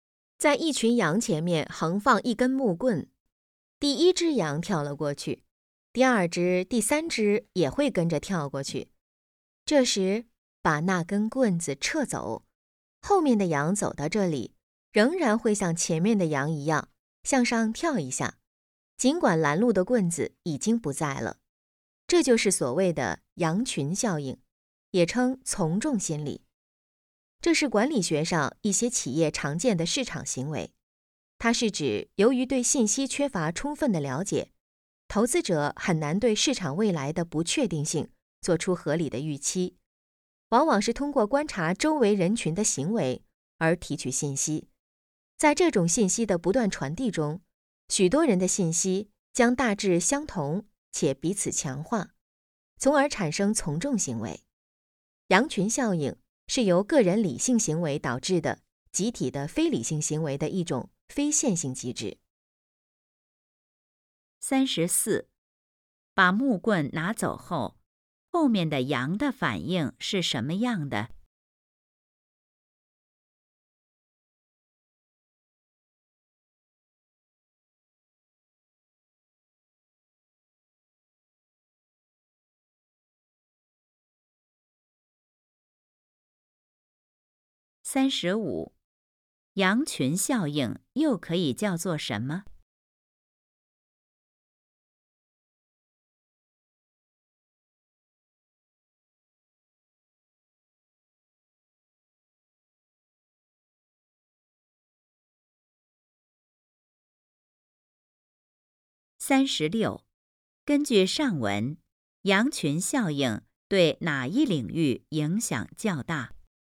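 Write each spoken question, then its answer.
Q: 把木棍拿走后,后面的羊的反应是什么样的?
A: 仍然会向上跳一下

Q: 羊群效应又可以叫做什么?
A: 从众心理

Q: 根据上文,羊群效应对哪一领域影响较大?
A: 管理学(企业市场行为)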